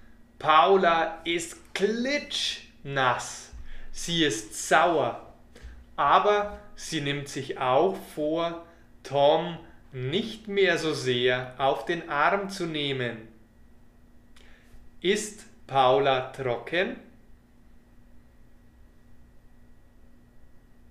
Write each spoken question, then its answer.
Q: Ist Paula trocken?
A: Nein, sie ist nicht trocken.